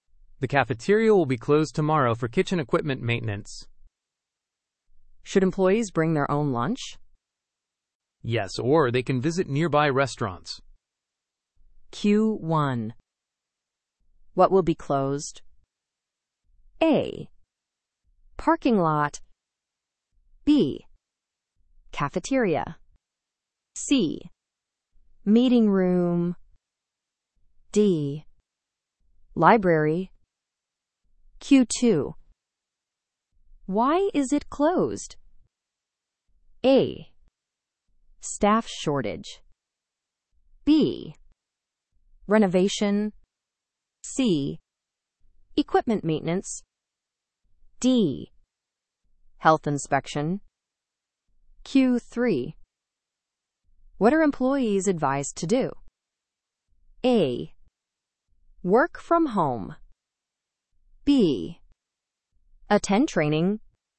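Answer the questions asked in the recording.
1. B: Cafeteria.
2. C: Equipment maintenance.
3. C: Bring lunch.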